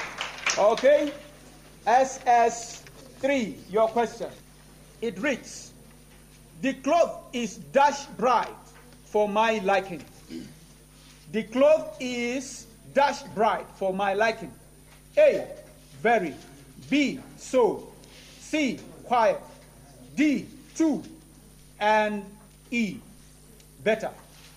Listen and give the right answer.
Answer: That's the correct answer.